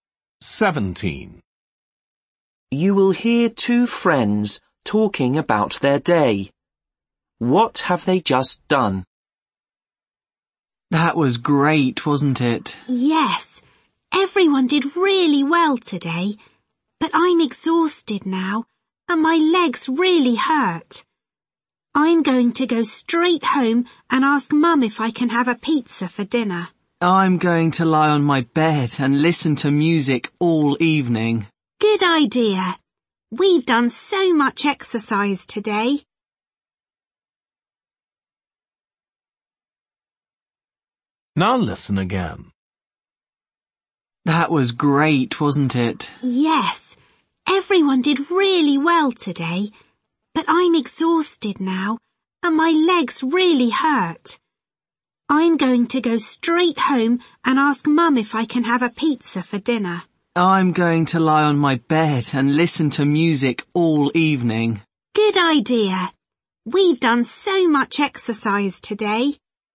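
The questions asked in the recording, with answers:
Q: What have they just done?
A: Done a lot of exercise (sport)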